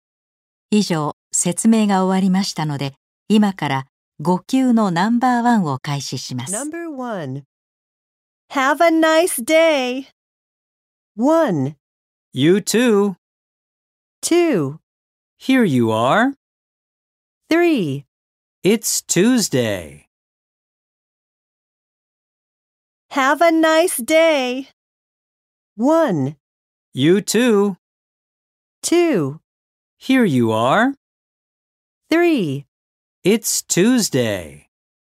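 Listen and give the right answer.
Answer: 1: You too.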